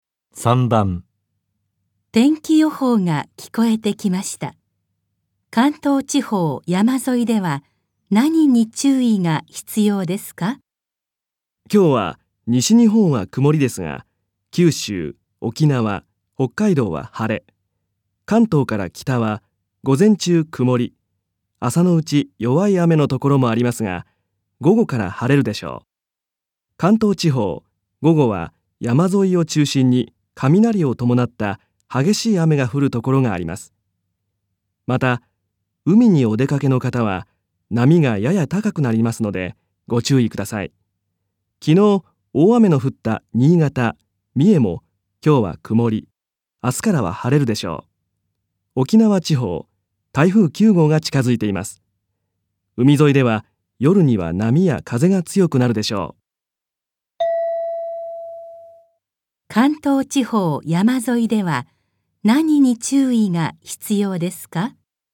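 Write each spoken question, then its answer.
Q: 関東地方山沿いでは何に注意が必要ですか?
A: 雷を伴った激しい雨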